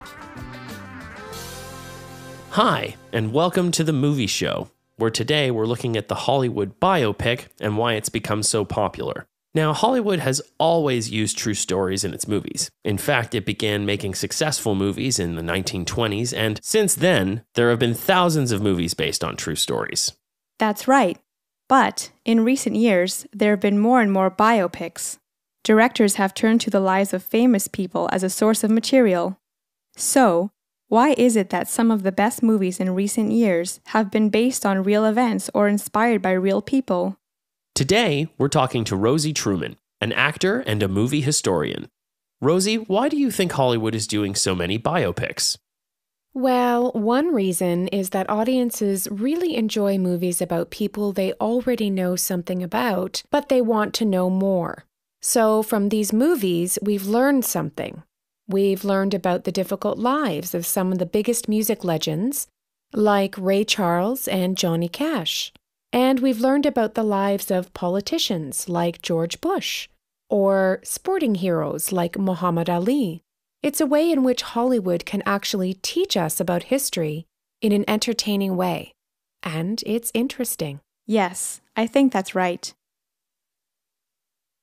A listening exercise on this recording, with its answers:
A. Listen to the first part of a radio program about movies and answer the questions.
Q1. What type of movie does the program talk about?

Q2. Why are these movies so popular?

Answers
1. Hollywood biopics
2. People like watching movies that give them more information about a person or event they already know something about. People can learn about history in an entertaining way.

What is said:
H1: Hi, and welcome to The Movie Show, where today we're looking at the Hollywood biopic and why it's become so popular. Now, Hollywood has always used true stories in its movies. In fact, it began making successful movies in the 1920s. And, since then, there have been thousands of movies based on true stories.
H2: That's right. But, in recent years, there've been more and more biopics. Directors have turned to the lives of famous people as a source of material. So, why is it that some of the best movies in recent years have been based on real events or inspired by real people?
H1: Today, we're talking to Rosie Truman, an actor and a film historian. Rosie, why do you think Hollywood is doing so many biopics?
R: Well, one reason is that audiences really enjoy movies about people they already know something about, but they want to know more. So, from these movies, we've learned something. We've learned about the difficult lives of some 165 of the biggest music legends, like Ray Charles and Johnny Cash. And we've learned about the lives of politicians, like George Bush, or sporting heroes, like Muhammad Ali. It's a way in which Hollywood can actually teach us about history in an entertaining way. And it's interesting.
H2: Yes, I think that's right.